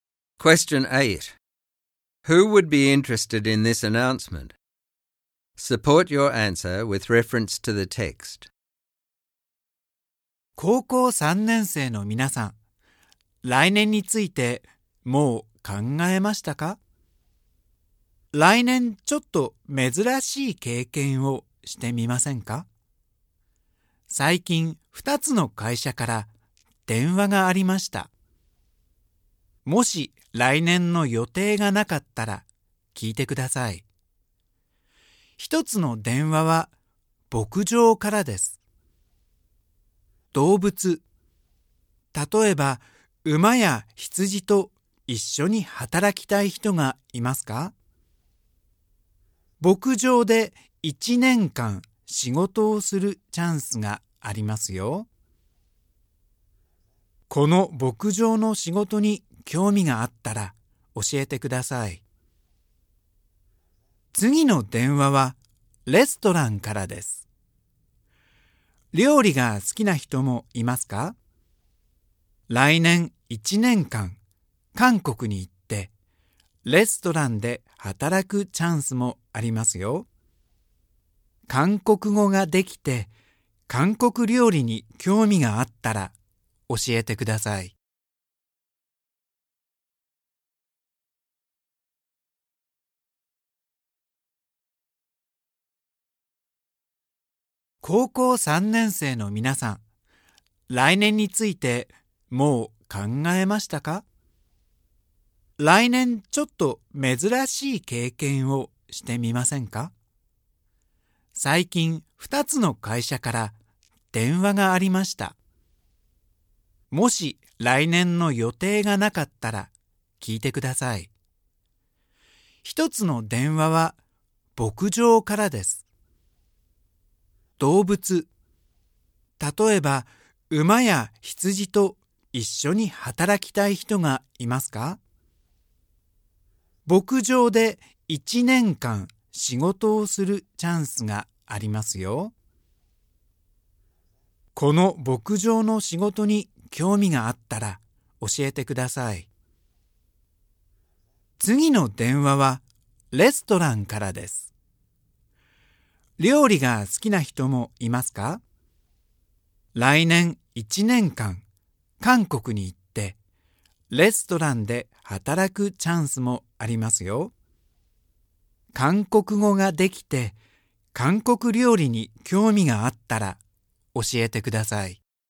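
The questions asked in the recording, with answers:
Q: Who would be interested in this announcement?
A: Year 12 (final-year high school) students with no plans for next year who want to work with animals on a farm, or who like cooking, speak Korean and want to work in a restaurant in Korea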